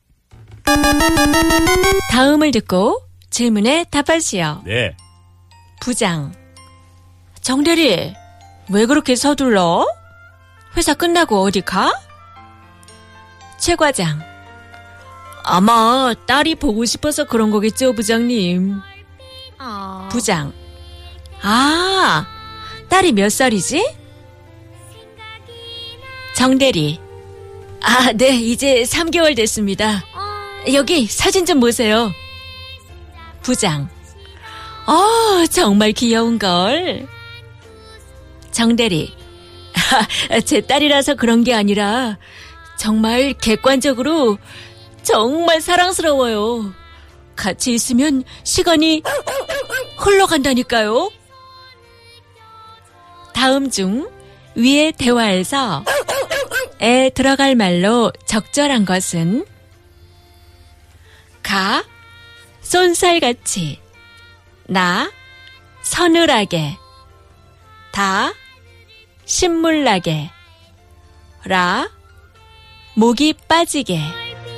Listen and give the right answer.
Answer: The correct answer is 가